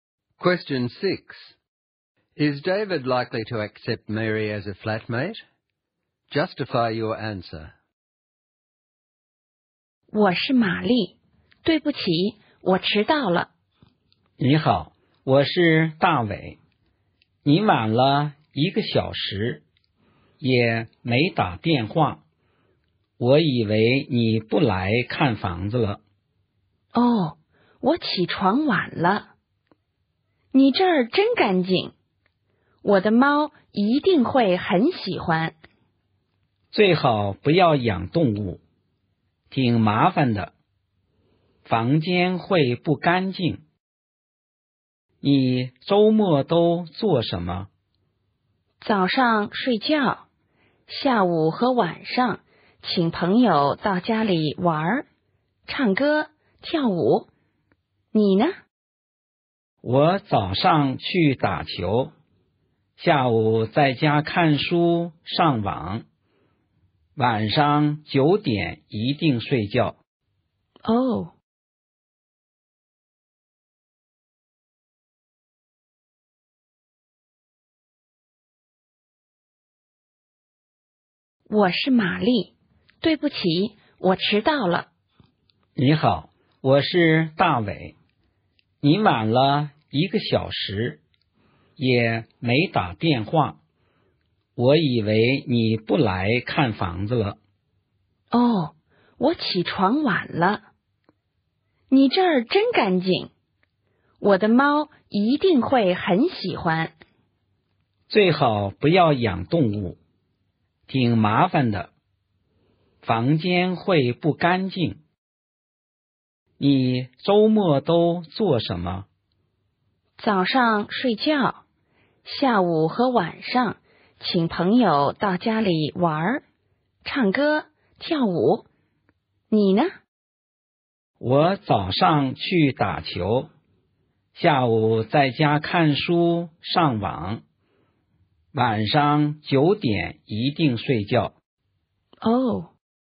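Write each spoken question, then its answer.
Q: Is David likely to accept Mary as a flatmate? Justify your answer.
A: No. Mary arrived an hour late without calling, wants to keep a cat, and parties with friends at weekends, while David dislikes pets and goes to bed at nine.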